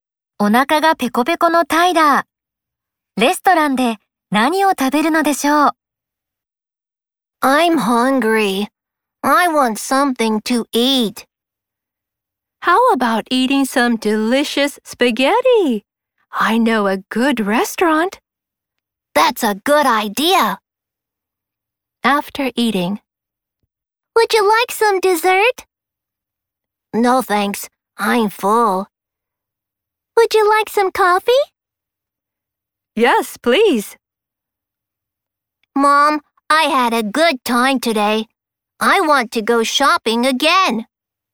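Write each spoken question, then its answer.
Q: レストランで何を食べるのでしょう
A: スパゲッティ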